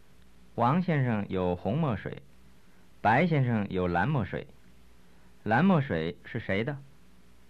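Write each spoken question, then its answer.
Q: 蓝墨水是谁的?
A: 白先生的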